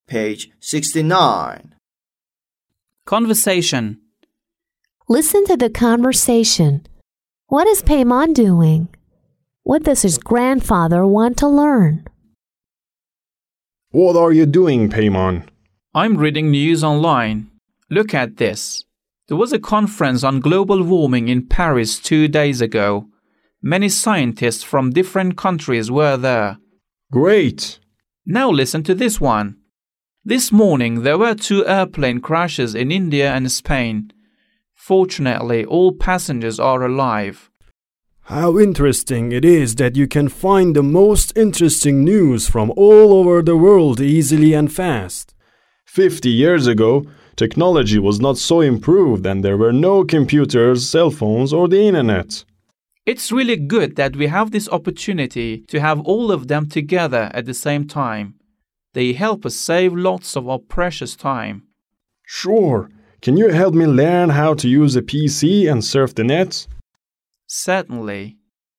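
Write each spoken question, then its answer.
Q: What is Paimon doing?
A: He is reading news online.

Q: What does his grandfather want to learn?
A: How to use a PC and surf the net.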